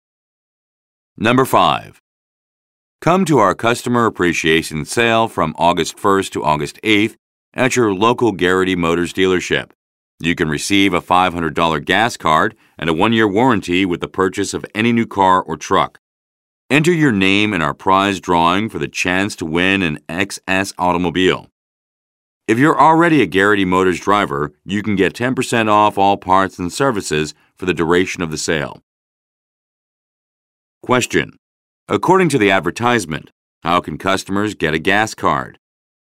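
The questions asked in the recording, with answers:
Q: According to the advertisement, how can customers get a gas card?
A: By buying any new car or truck (during the sale)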